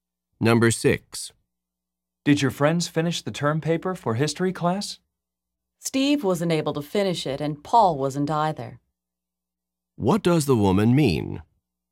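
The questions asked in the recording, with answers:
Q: What does the woman mean?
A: Neither Steve nor Paul finished the paper.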